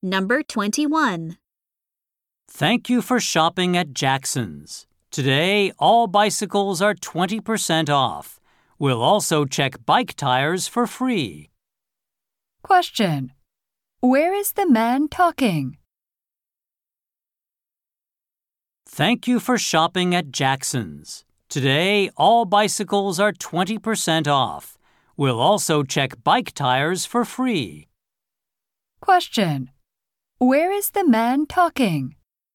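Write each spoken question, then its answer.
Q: Where is the man talking?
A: At a bicycle shop (Jackson's)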